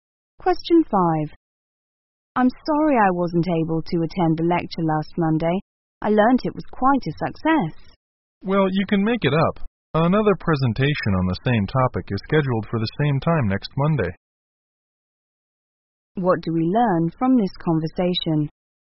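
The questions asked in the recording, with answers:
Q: What do we learn from this conversation?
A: The lecture will be given again next Monday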